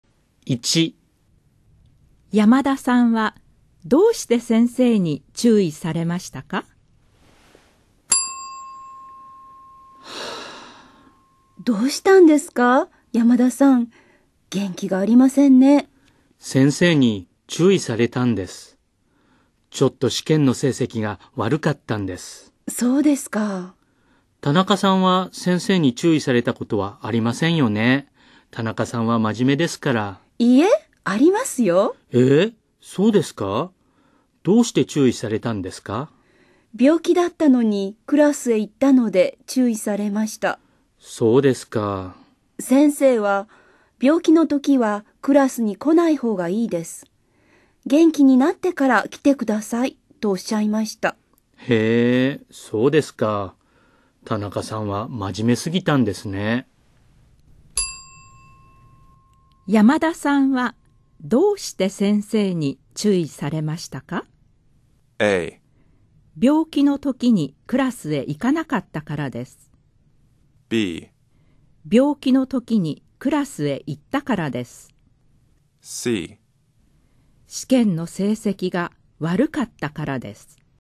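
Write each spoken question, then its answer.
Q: 山田さんはどうして先生に注意されましたか?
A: C: 試験の成績が悪かったからです。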